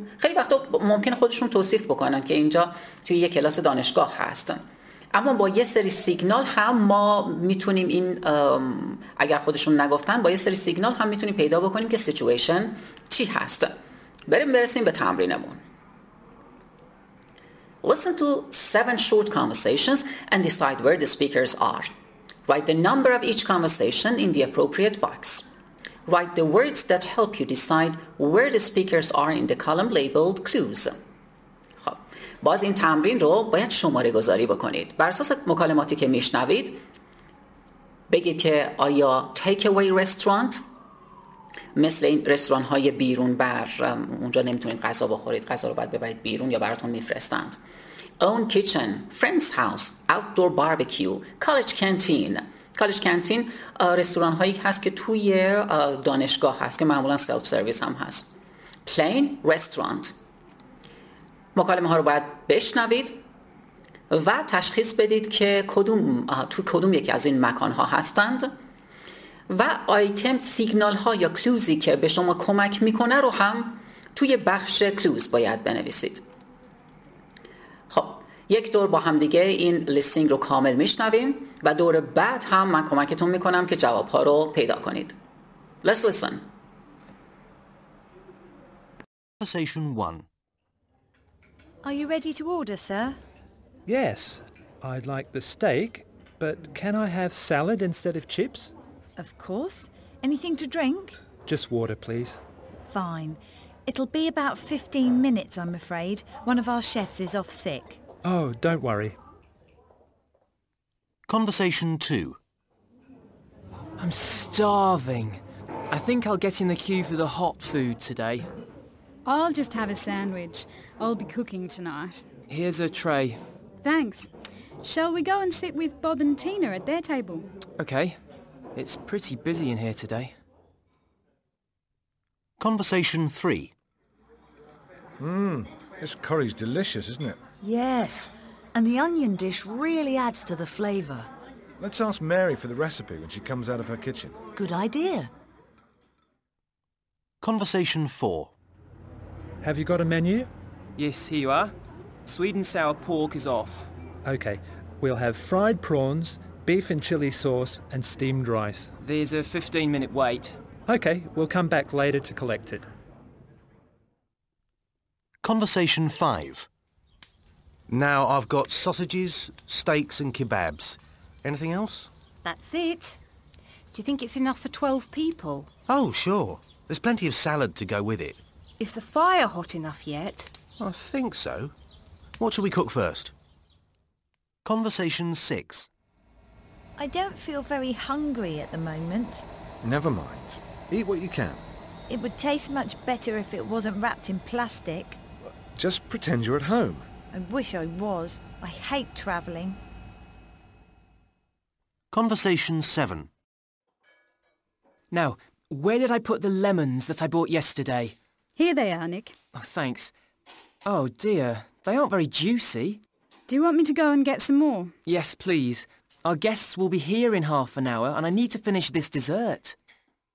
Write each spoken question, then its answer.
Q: Listen to 7 short conversations and decide where the speakers are.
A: دیگه اینجا کاملا مشخص میشه که توی یک کالج کانتین هستند.

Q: Listen to 7 short conversations and decide where the speakers are.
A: So, conversation 3 is friend's house.

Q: Listen to 7 short conversations and decide where the speakers are.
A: پس اینجا کانورسیشن 4 رو وصل میکنیم به takeaway restaurant.

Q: Listen to 7 short conversations and decide where the speakers are.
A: Outdoor barbecue conversation 5.

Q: Listen to 7 short conversations and decide where the speakers are.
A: Conversation 6 was plain.

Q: Listen to 7 short conversations and decide where the speakers are.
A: خب اینا اون کیچن هم دیگه.